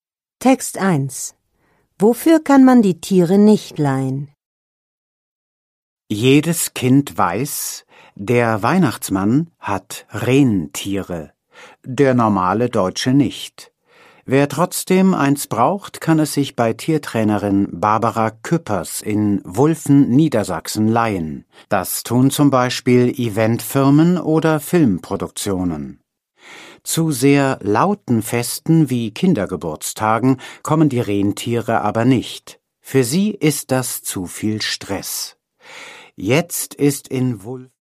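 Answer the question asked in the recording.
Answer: Für sehr laute Feste wie Kindergeburtstage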